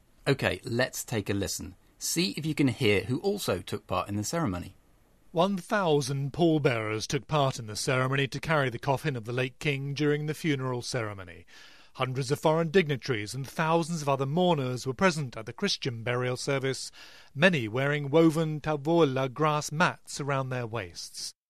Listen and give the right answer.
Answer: The report mentioned that 1,000 pallbearers took part in the ceremony.